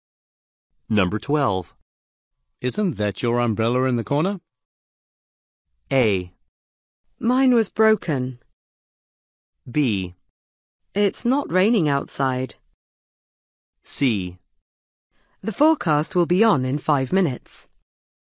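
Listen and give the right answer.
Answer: A: Mine was broken.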